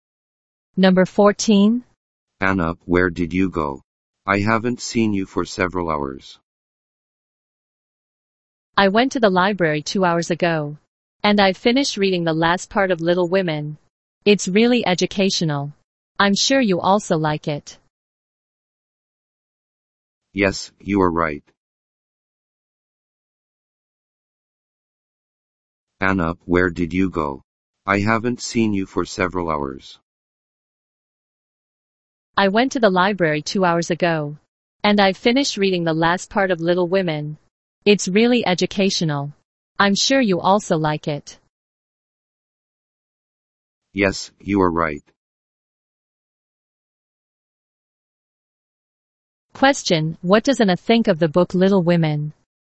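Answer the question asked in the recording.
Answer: It's really educational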